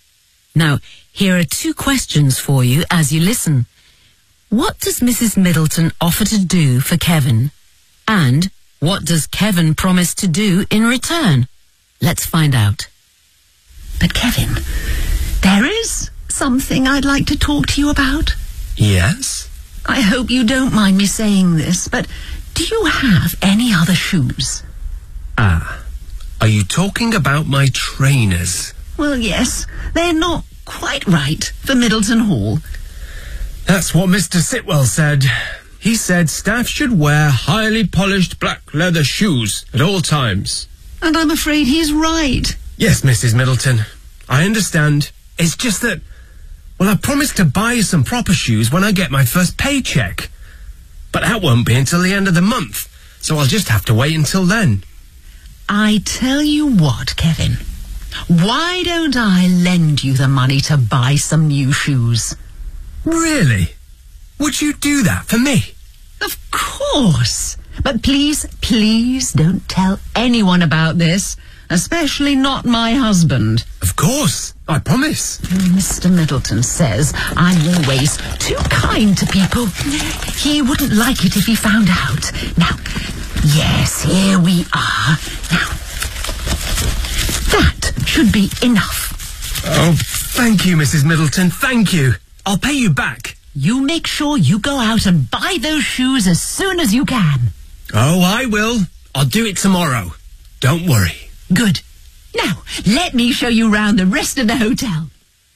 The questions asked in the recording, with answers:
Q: What does Mrs. Middleton offer to do for Kevin?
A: why don't I lend you the money to buy some new shoes?

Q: And what does Kevin promise to do in return?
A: He promises not to tell anyone about it.